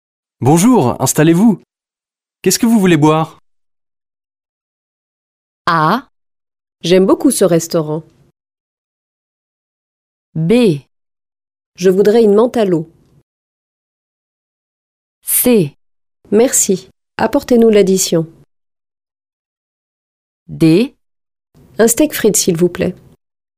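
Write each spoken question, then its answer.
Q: Bonjour, installez-vous. Qu'est-ce que vous voulez boire?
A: B: Je voudrais une menthe à l'eau.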